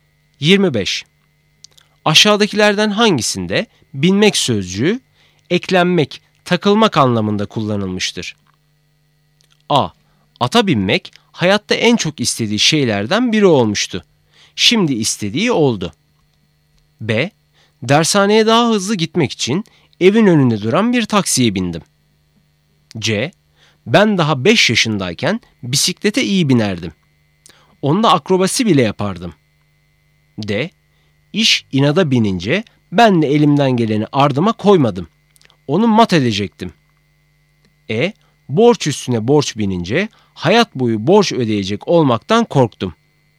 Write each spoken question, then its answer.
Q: Aşağıdakilerden hangisinde binmek sözcüğü eklenmek, takılmak anlamında kullanılmıştır?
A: Doğru cevap E. Borç üstüne borç binince hayat boyu borç ödeyecek olmaktan korktum.